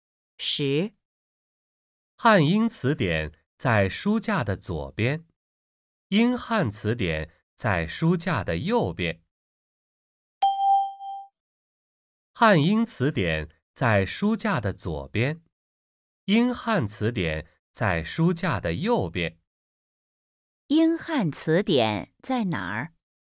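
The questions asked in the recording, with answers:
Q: 英汉词典在哪儿?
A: 在书架的右边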